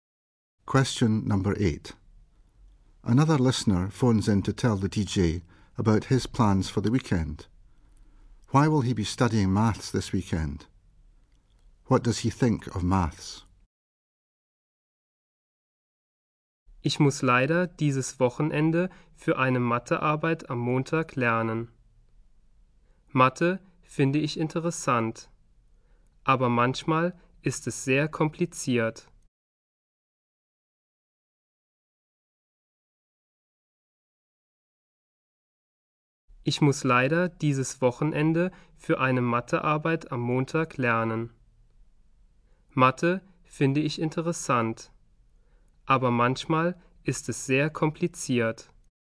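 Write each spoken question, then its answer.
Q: Why will he be studying maths this weekend?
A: He has a maths test on Monday

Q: What does he think of maths?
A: Interesting, but sometimes very complicated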